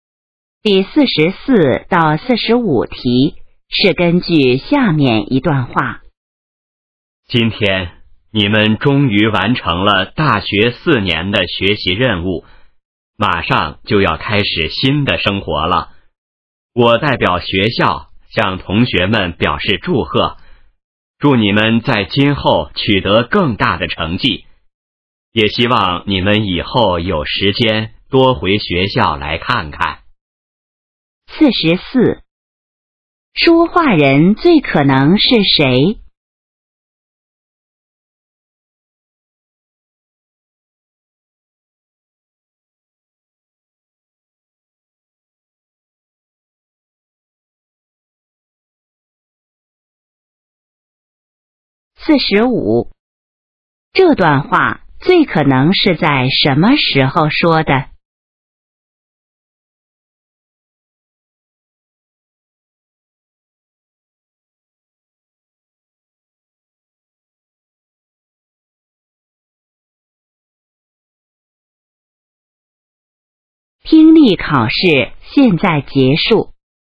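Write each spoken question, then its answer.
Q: 这段话最可能是在什么时候说的?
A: 大学毕业的时候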